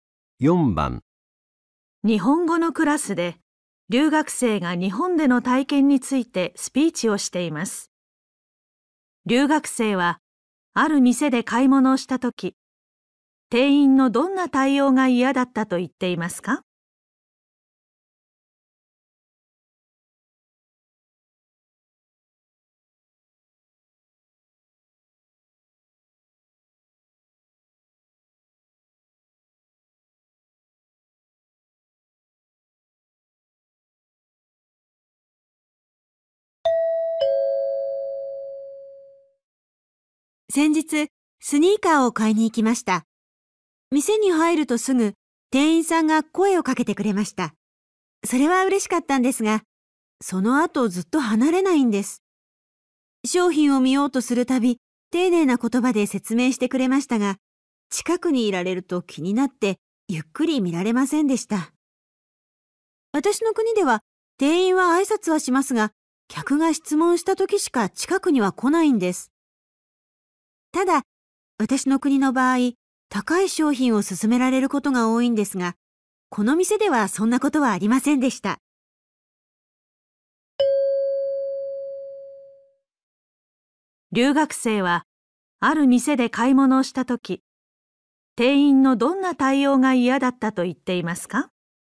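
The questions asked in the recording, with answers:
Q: 留学生は、ある店で買い物をしたとき、店員のどんな対応が嫌だったと言っていますか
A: ずっとそばを離れなかったこと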